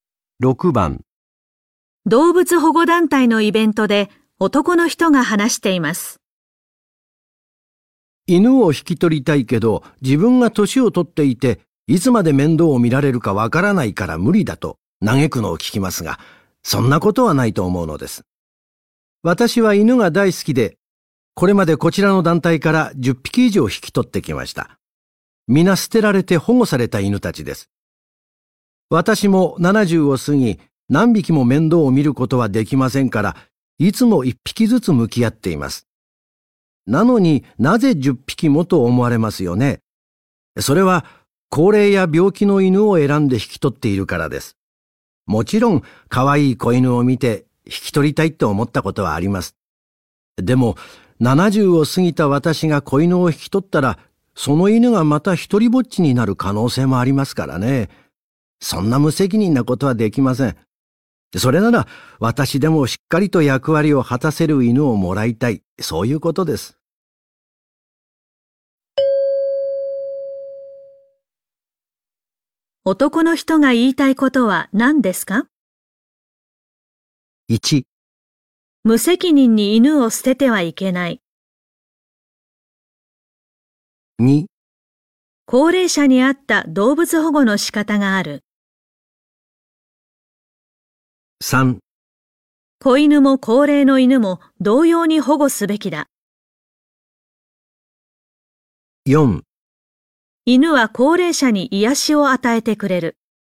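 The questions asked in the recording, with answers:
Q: 男の人が言いたいことは何ですか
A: 2: 高齢者に合った動物保護の仕方がある。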